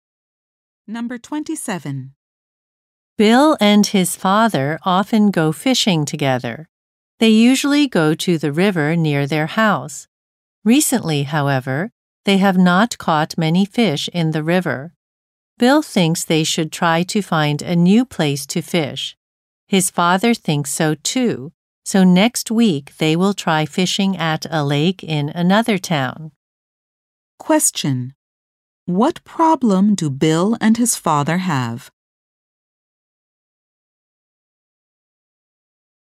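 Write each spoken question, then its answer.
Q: What problem do Bill and his father have?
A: They have not caught many fish in the river.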